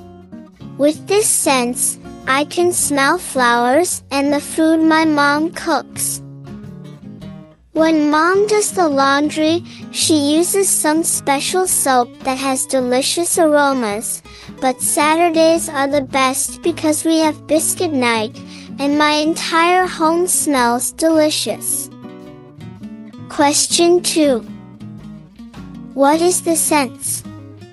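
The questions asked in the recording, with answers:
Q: What is the sense?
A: Smell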